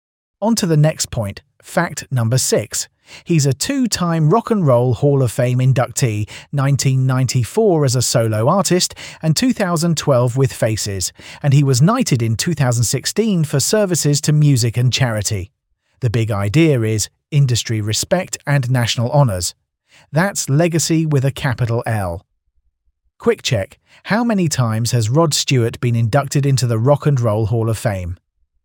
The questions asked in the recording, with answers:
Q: How many times has Rod Stewart been inducted into the Rock and Roll Hall of Fame?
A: Correct answer, 2.